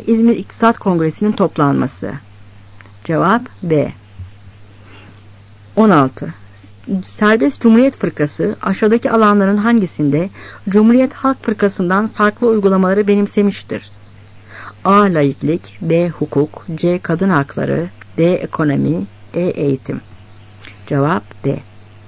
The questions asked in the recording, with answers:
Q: Serbest Cumhuriyet Fırkası aşağıdaki alanların hangisinde Cumhuriyet Halk Fırkası'ndan farklı uygulamaları benimsemiştir?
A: Cevap D.